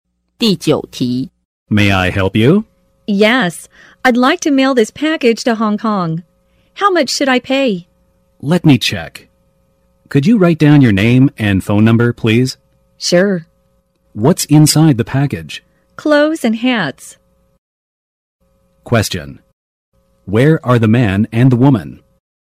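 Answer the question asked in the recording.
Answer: At a post office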